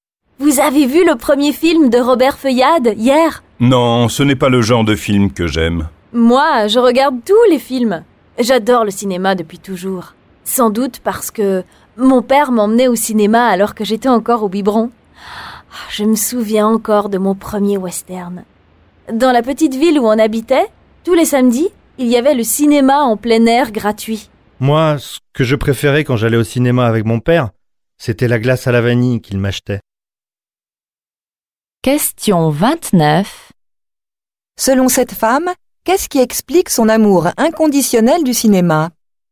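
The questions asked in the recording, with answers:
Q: Selon cette femme, qu'est-ce qui explique son amour inconditionnel du cinéma ?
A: Son père l'emmenait au cinéma quand elle était encore bébé.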